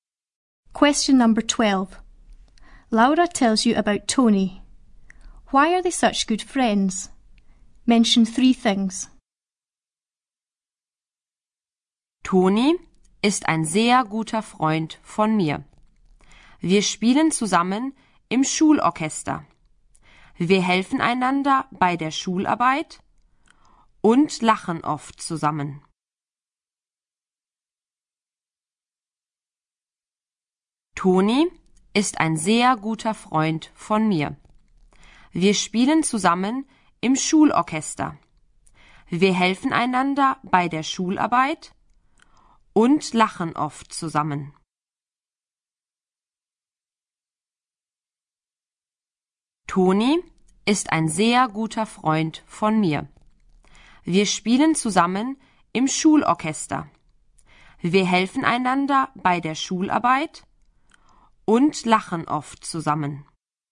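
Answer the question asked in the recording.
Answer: They play in the school orchestra together, help each other with schoolwork and often laugh together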